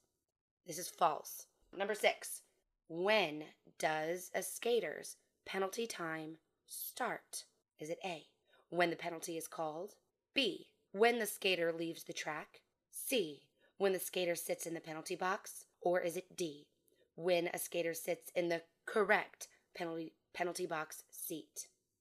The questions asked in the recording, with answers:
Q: when does a skater's penalty time start?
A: The answer is C, when the skater sits in the penalty box.